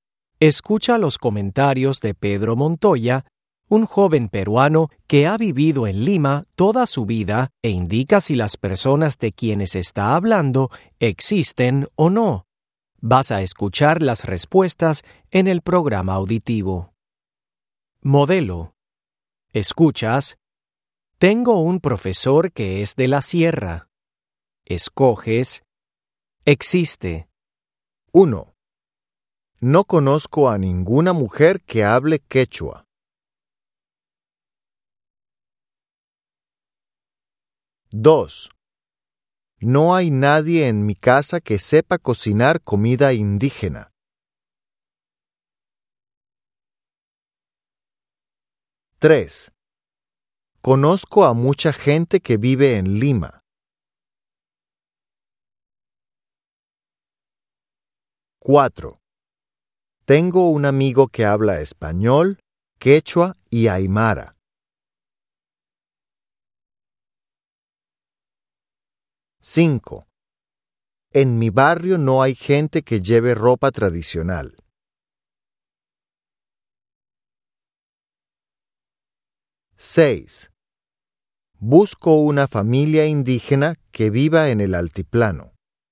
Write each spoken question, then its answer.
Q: No conozco a ninguna mujer que hable quechua.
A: 1. No existe.

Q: No hay nadie en mi casa que sepa cocinar comida indígena.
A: 2. No existe.

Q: Conozco a mucha gente que vive en Lima.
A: 3. Existe.

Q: Tengo un amigo que habla español, quechua y aymara.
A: 4. Existe.

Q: En mi barrio no hay gente que lleve ropa tradicional.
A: 5. No existe.

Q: Busco una familia indígena que viva en el altiplano.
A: 6. No existe.